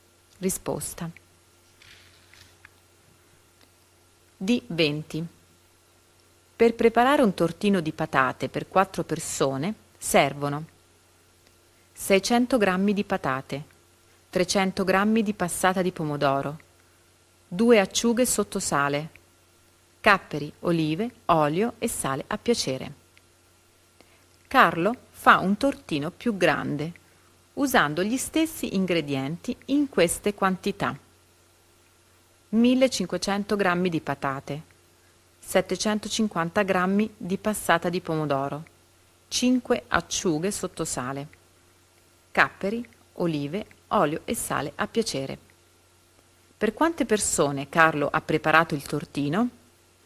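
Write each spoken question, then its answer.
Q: Per quante persone Carlo ha preparato il tortino?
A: 10 persone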